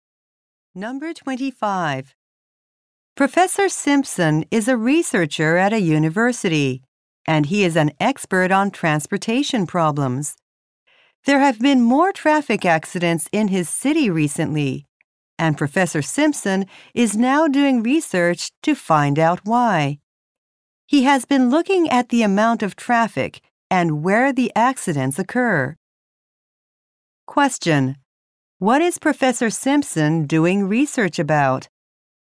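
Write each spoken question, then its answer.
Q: what is Professor Simpson doing research about?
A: Why traffic accidents have increased in his city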